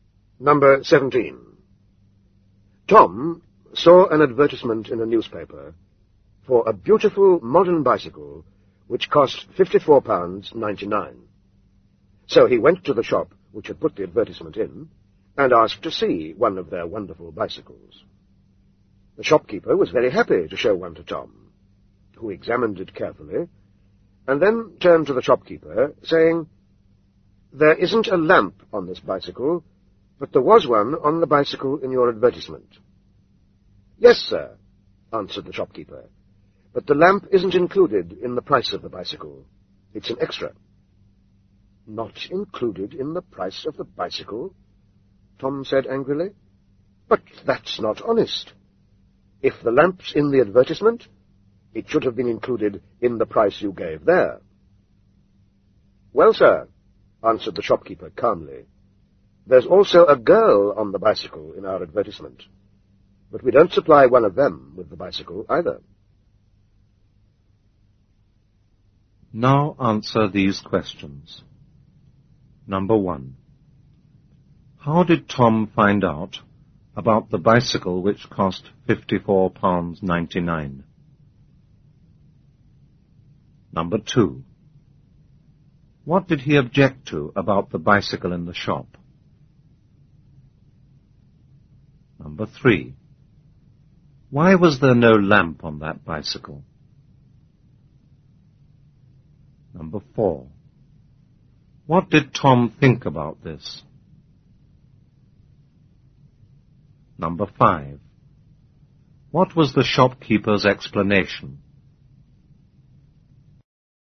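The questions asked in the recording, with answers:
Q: How did Tom find out about the bicycle which cost £54.99?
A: He saw an advertisement in a newspaper

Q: What did he object to about the bicycle in the shop?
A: It had no lamp, though the one in the advertisement did

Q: Why was there no lamp on that bicycle?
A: The lamp was an extra, not included in the price

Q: What did Tom think about this?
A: He thought it was not honest

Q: What was the shopkeeper's explanation?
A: There was also a girl on the bicycle in the advertisement, but they didn't supply one with the bicycle either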